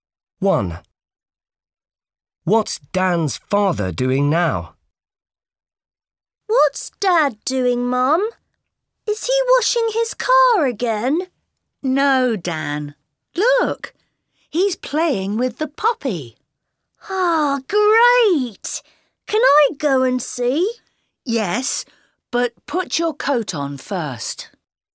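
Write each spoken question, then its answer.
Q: What's Dan's father doing now?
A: playing with the puppy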